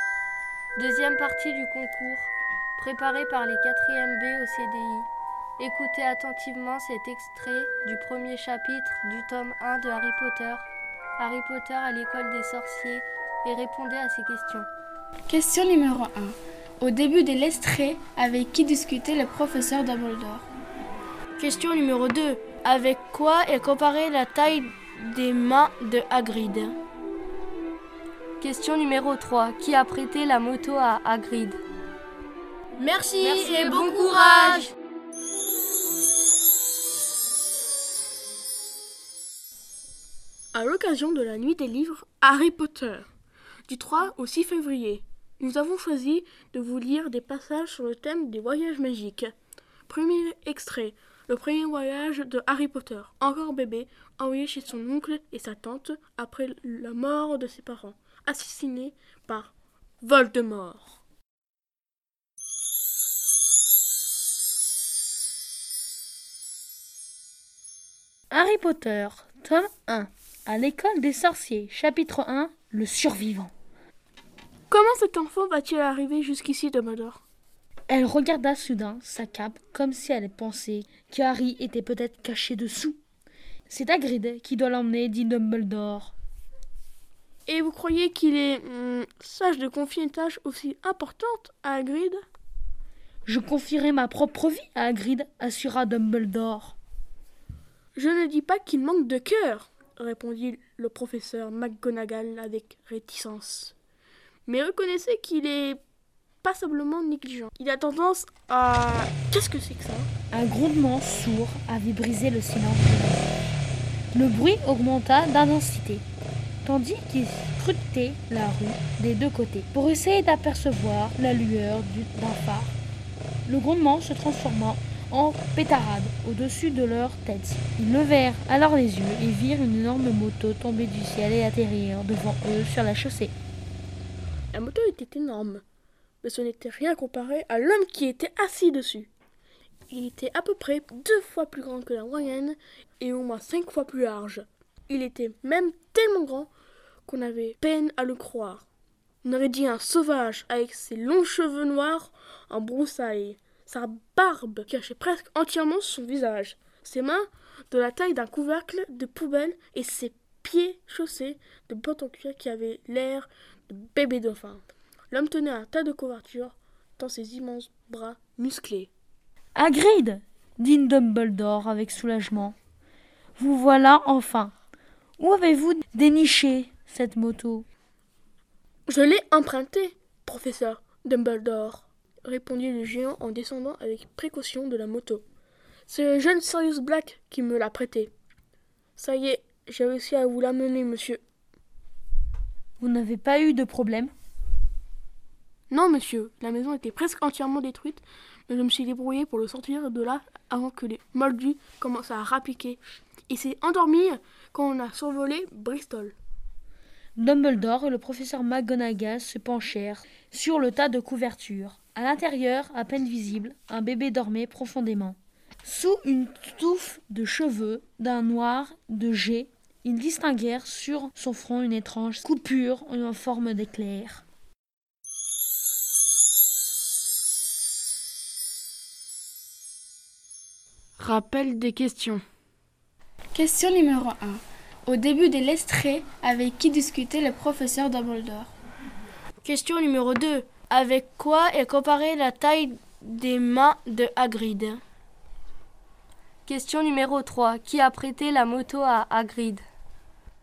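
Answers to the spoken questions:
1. Le professeur McGonagall
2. Un couvercle de poubelle
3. Sirius Black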